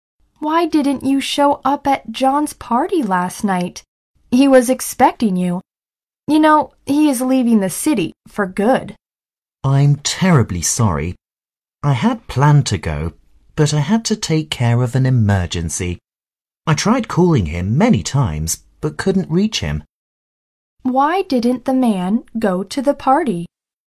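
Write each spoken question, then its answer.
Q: Why didn't the man go to the party?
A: He had to take care of an emergency.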